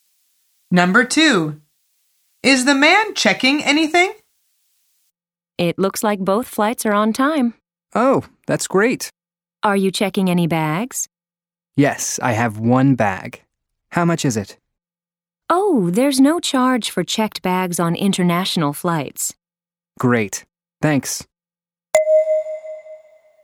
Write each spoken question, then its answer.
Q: Number two. Is the man checking anything?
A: The answer is yes, he is checking one bag.